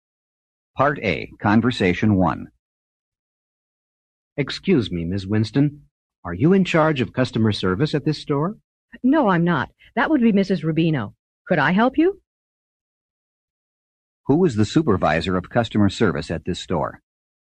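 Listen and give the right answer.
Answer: Mrs. Rubino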